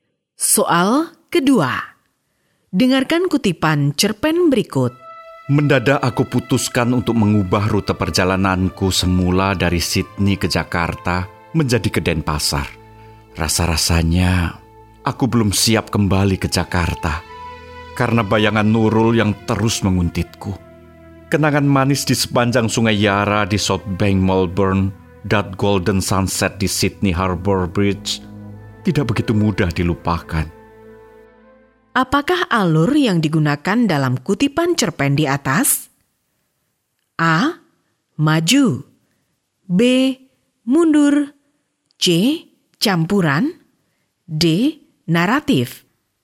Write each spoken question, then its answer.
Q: Apakah alur yang digunakan dalam kutipan cerpen di atas?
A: Jawaban benar adalah B. Mundur.